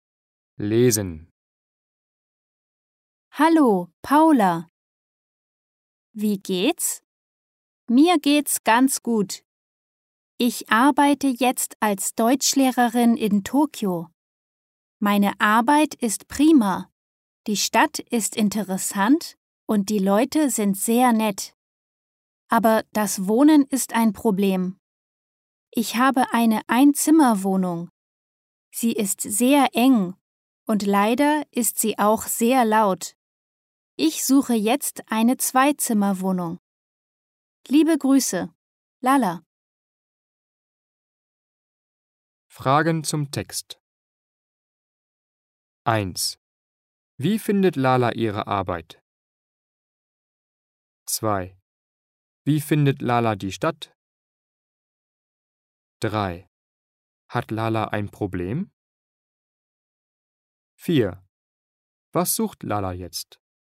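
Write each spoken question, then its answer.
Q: Wie findet Lala ihre Arbeit?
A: Prima.

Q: Wie findet Lala die Stadt?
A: Interessant.

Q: Hat Lala ein Problem?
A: Ja, das Wohnen: ihre Einzimmerwohnung ist eng und laut.

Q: Was sucht Lala jetzt?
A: Eine Zweizimmerwohnung.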